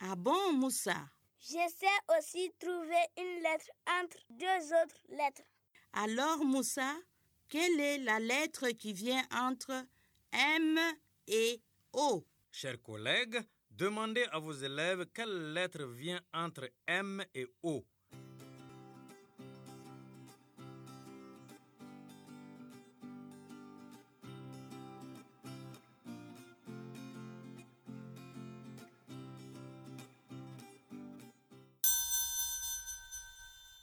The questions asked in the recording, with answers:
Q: Alors, Moussa, quelle est la lettre qui vient entre M et O?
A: C'est N.